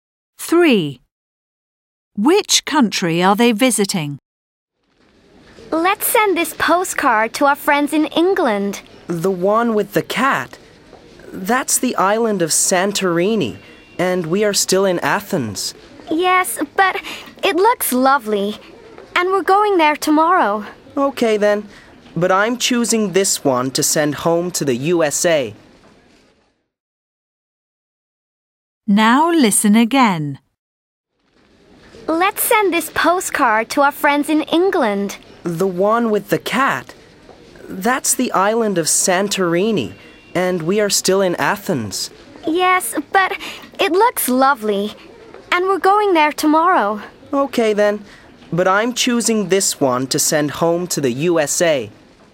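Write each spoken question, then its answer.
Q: Which country are they visiting?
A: Greece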